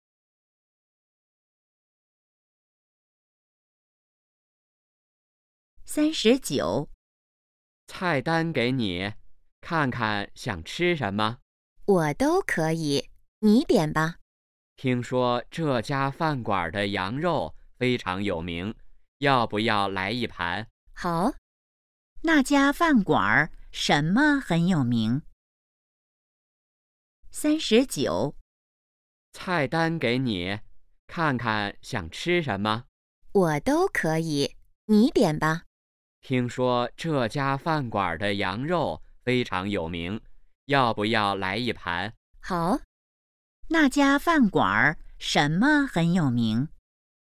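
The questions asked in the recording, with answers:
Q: 那家饭馆什么很有名?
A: 羊肉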